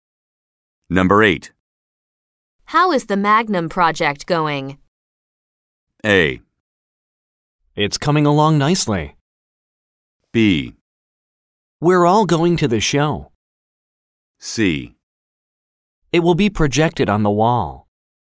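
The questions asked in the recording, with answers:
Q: How is the Magnum project going?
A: A: It's coming along nicely.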